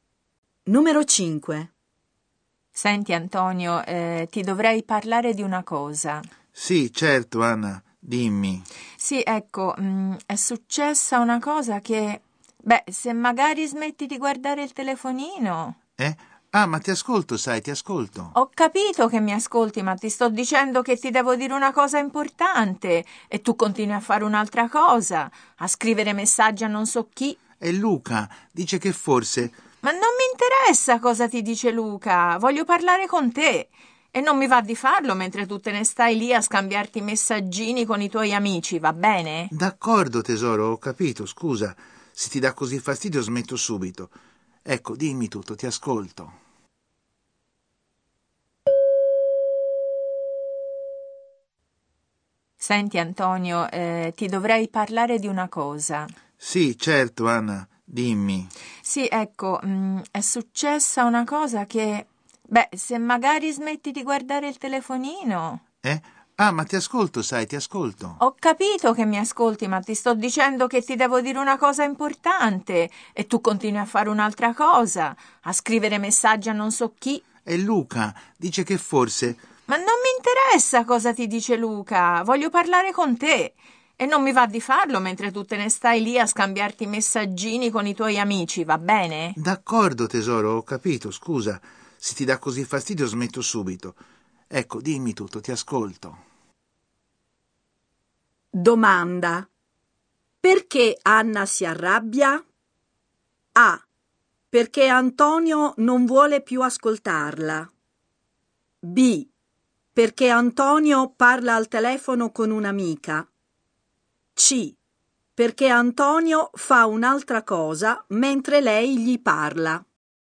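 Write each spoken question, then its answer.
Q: Domanda. Perché Anna si arrabbia?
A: C: Perché Antonio fa un'altra cosa mentre lei gli parla.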